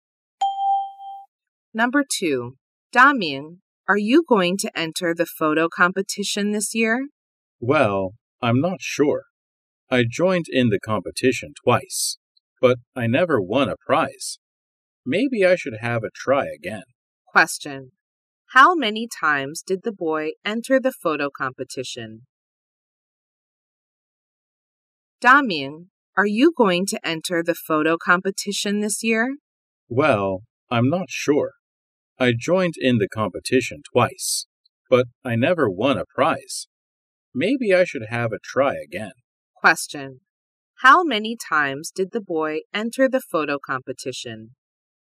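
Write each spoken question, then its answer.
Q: How many times did the boy enter the photo competition?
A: Twice.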